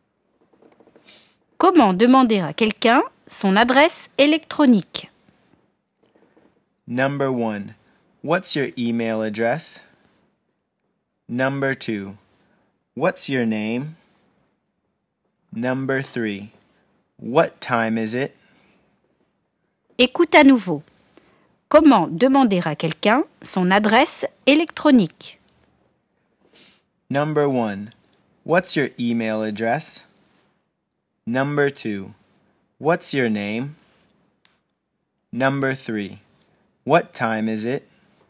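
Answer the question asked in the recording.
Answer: 1: What's your email address?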